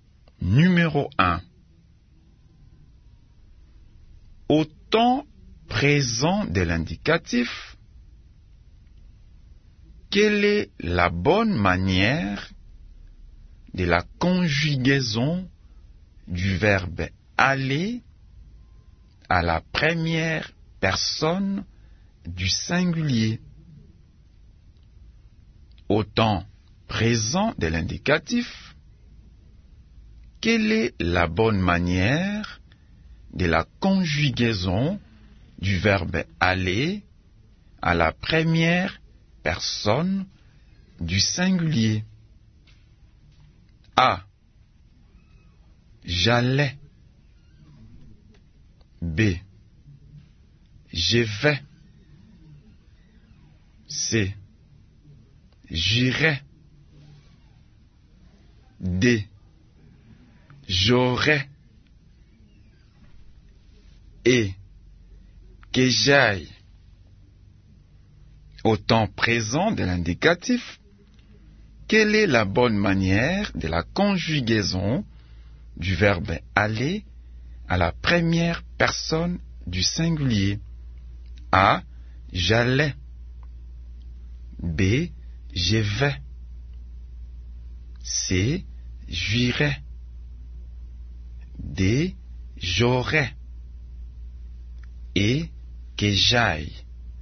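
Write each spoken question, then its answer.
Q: Au temps présent de l'indicatif, quelle est la bonne manière de la conjugaison du verbe aller à la première personne du singulier?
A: B: Je vais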